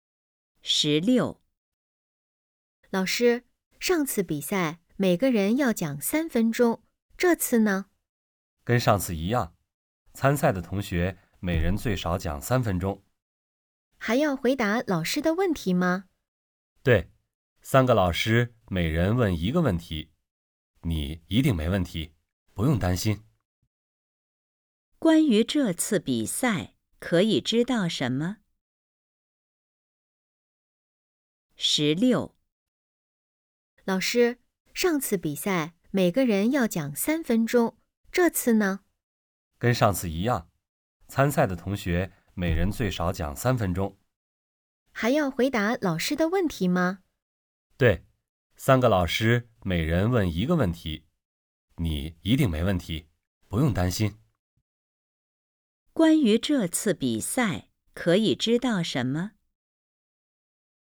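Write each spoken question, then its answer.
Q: 关于这次比赛,可以知道什么?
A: 每人最少讲3分钟,还要回答老师的问题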